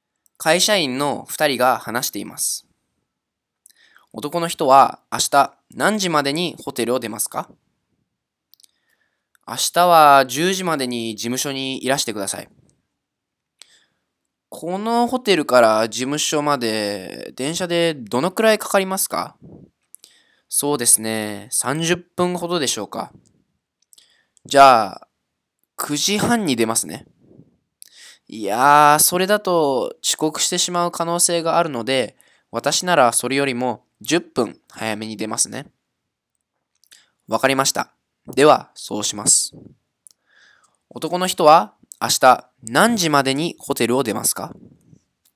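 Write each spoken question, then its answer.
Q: 男の人は明日何時までにホテルを出ますか?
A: 9時20分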